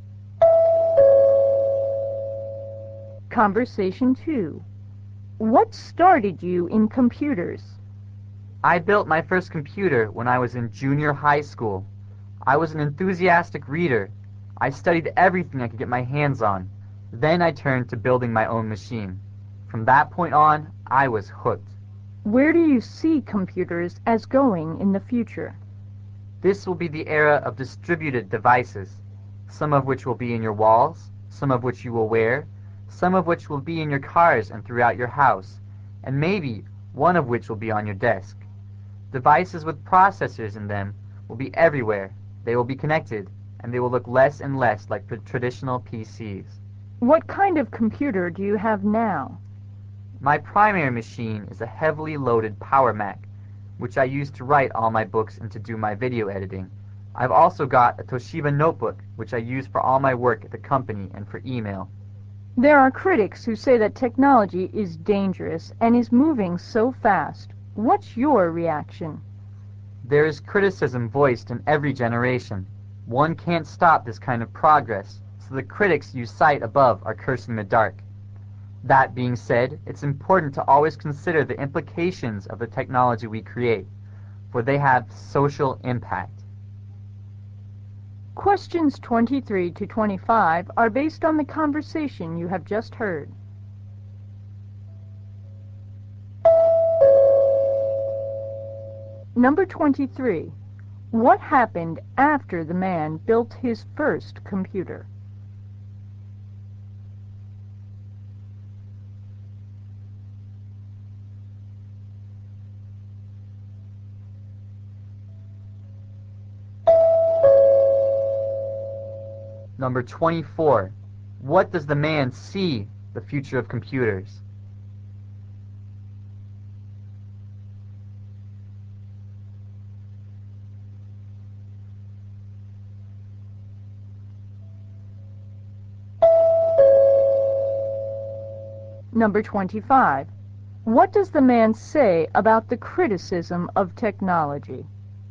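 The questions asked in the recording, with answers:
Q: What happened after the man built his first computer?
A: He was hooked on computers

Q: What does the man see the future of computers?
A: Connected devices with processors will be everywhere

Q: What does the man say about the criticism of technology?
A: Progress can't be stopped, but its social impact should be considered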